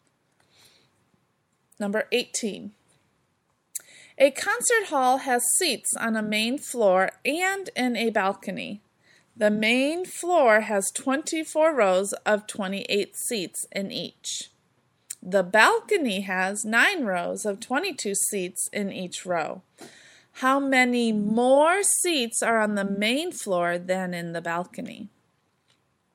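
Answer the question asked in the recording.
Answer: 474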